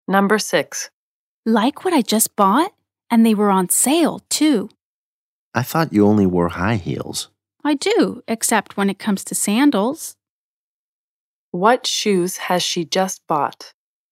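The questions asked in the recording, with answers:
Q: What shoes has she just bought?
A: Sandals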